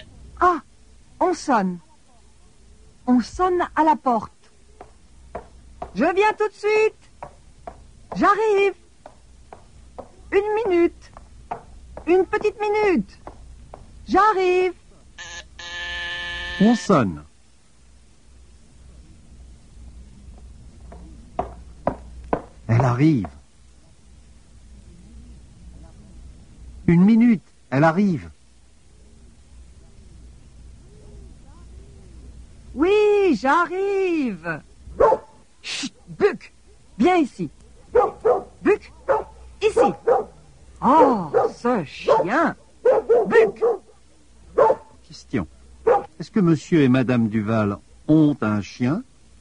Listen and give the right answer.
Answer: Oui. Ils ont un chien.